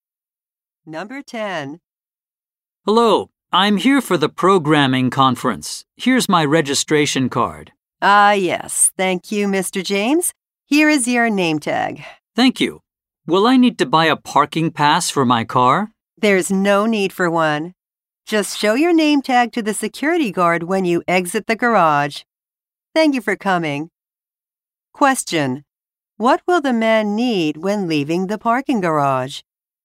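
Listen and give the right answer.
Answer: His name tag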